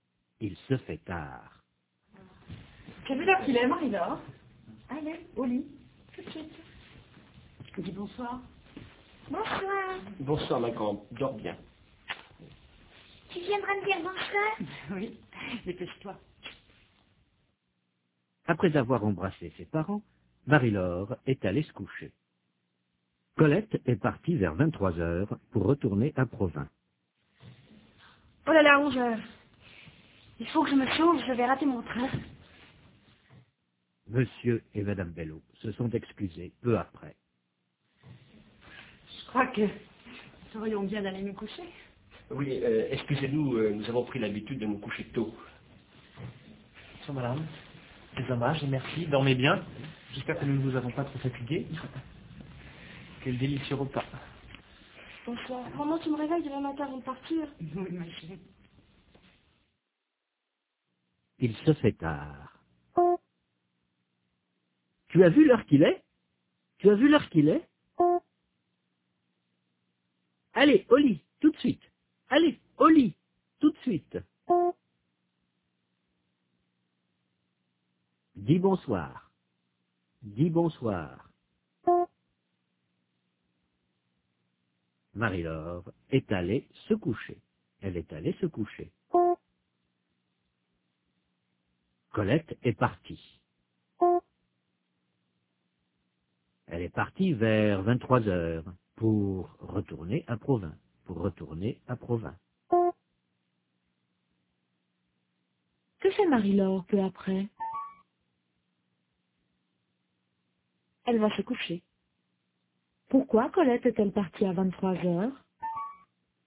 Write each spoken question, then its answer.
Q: Pourquoi Colette est-elle partie à 23h?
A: Pour retourner à Provins.